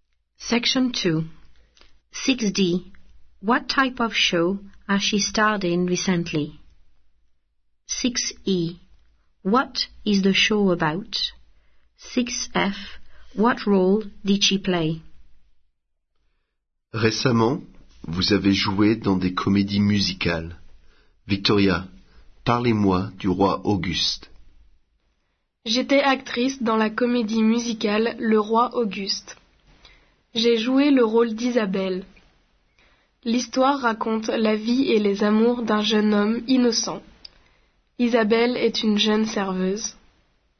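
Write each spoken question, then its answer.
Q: What type of show has she starred in recently?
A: Musicals

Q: What is the show about?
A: The life and loves of an innocent young man

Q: What role did she play?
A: Isabelle, a young waitress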